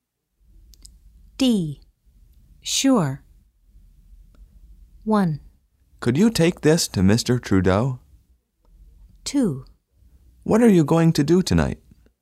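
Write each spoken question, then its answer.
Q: Sure.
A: 1: Could you take this to Mr. Trudeau?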